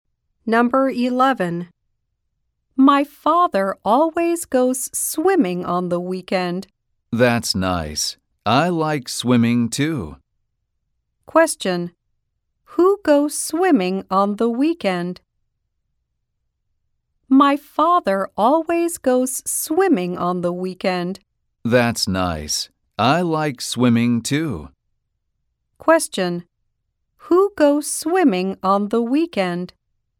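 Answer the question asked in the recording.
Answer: The speaker's father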